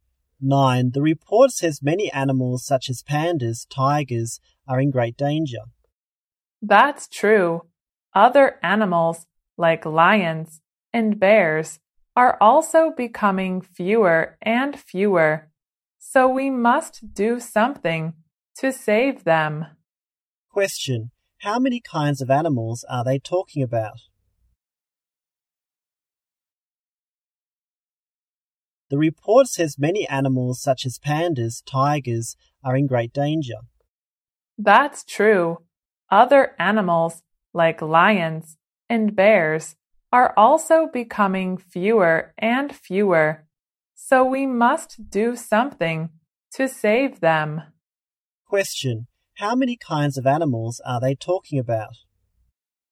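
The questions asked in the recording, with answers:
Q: How many kinds of animals are they talking about?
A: Four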